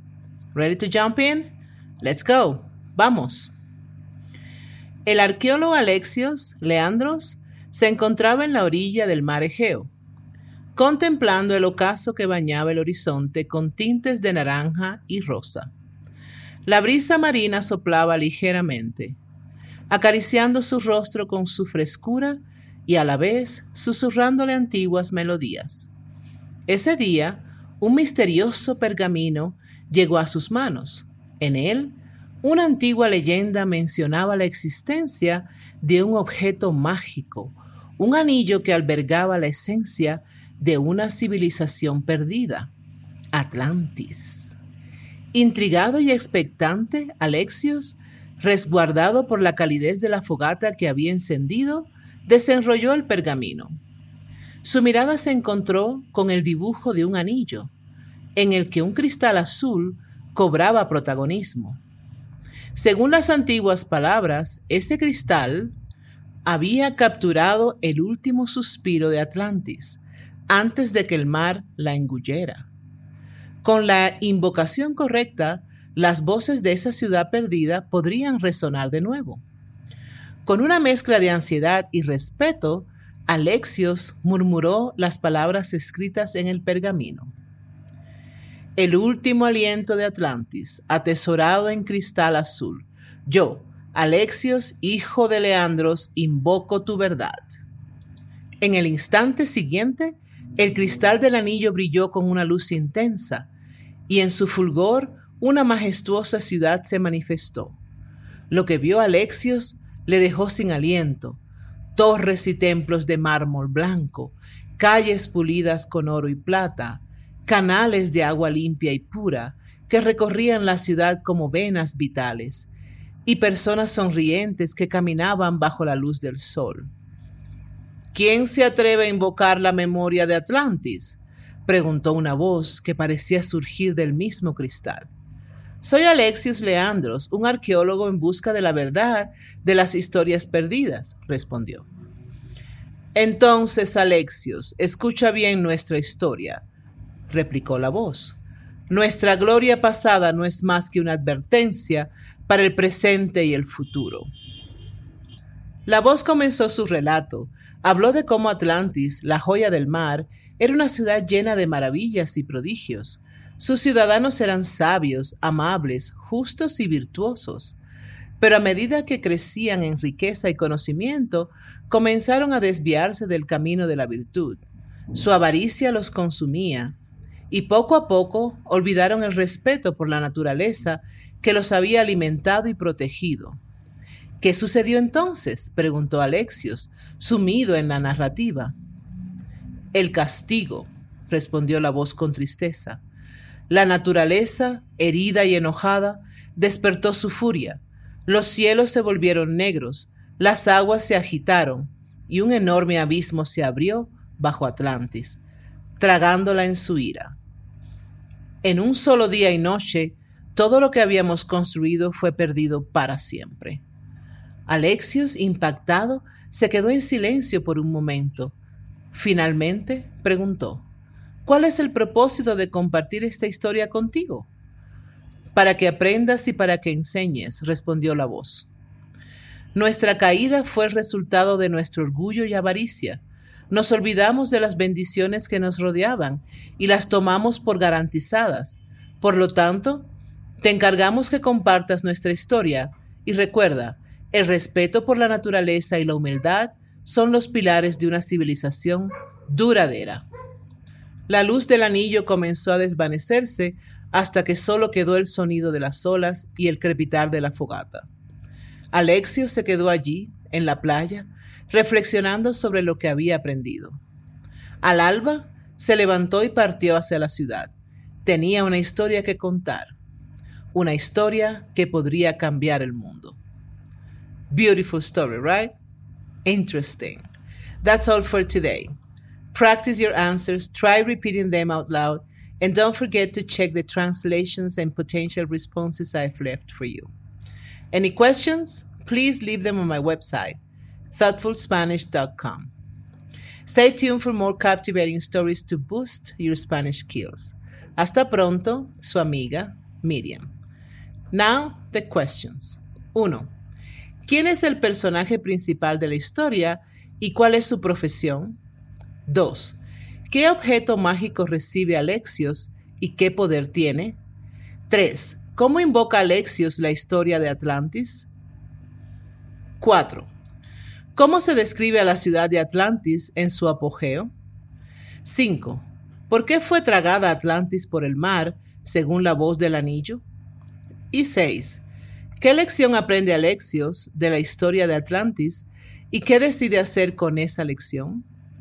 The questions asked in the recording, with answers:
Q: ¿Quién es el personaje principal de la historia y cuál es su profesión?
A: El personaje principal de la historia es Alexios Leandros, un arqueólogo.

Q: ¿Qué objeto mágico recibe Alexios y qué poder tiene?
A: Alexios recibe un anillo mágico con un cristal azul que tiene el poder de mostrar la historia de la ciudad perdida de Atlantis.

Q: ¿Cómo invoca Alexios la historia de Atlantis?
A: Alexios invoca la historia de Atlantis al decir la invocación el último aliento de Atlantis, atesorado en cristal azul, yo, Alexios, hijo de Leandros, invoco tu verdad.

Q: ¿Cómo se describe a la ciudad de Atlantis en su apogeo?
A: Atlantis se describe como una ciudad magnífica, con edificios de mármol blanco, calles pavimentadas con oro y plata, y canales de agua pura que recorren la ciudad.

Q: ¿Por qué fue tragada Atlantis por el mar, según la voz del anillo?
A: Atlantis fue tragada por el mar porque sus habitantes se volvieron avaros y orgullosos y perdieron el respeto por la naturaleza.

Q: ¿Qué lección aprende Alexios de la historia de Atlantis y qué decide hacer con esa lección?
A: Alexios aprende que el orgullo y la avaricia pueden llevar a la destrucción de una civilización decide compartir la historia de Atlantis para enseñar a otros la importancia de la humildad y el respeto por la naturaleza.